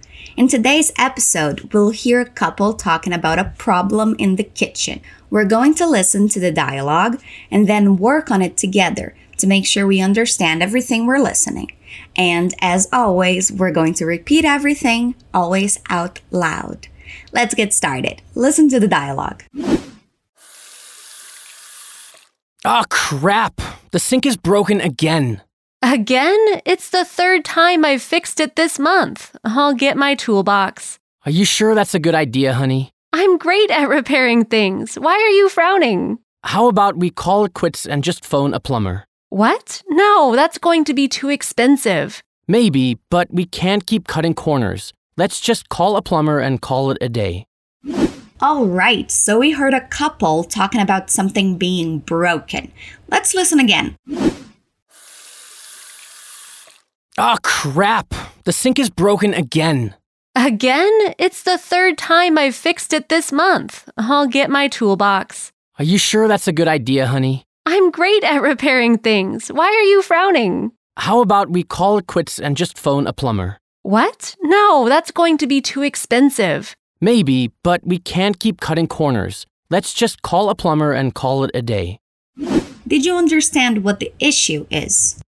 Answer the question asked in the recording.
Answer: So, Bill and June are talking about the kitchen sink being broken again.